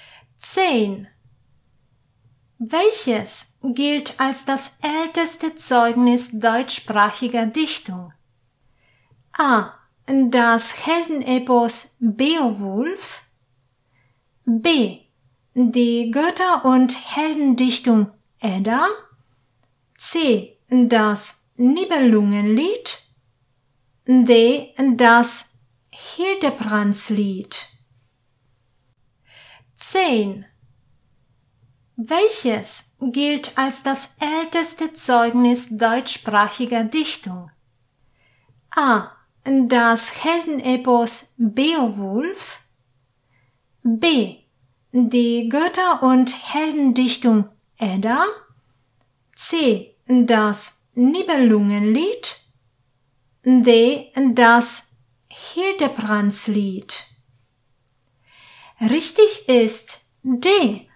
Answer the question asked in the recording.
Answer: Richtig ist D.